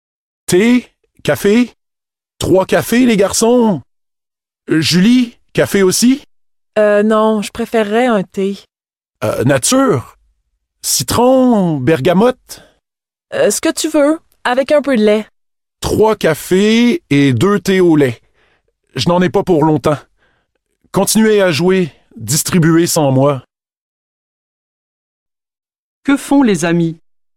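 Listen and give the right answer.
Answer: Ils jouent aux cartes.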